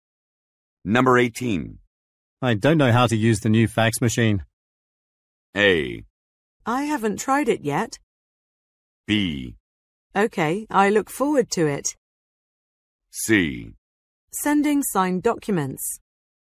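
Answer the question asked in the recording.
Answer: A: I haven't tried it yet.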